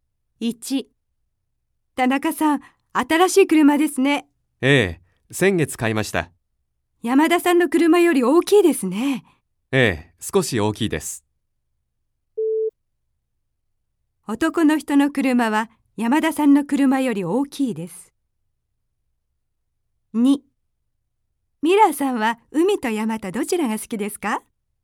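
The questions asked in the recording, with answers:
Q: 男の人の車は山田さんの車より大きいです。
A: ○ (正しい)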